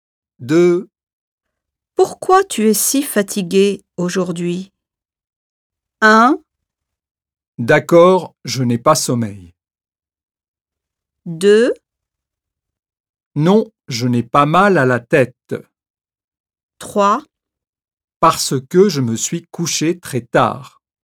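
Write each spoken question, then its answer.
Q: Pourquoi tu es si fatigué aujourd'hui?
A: 3: Parce que je me suis couché très tard.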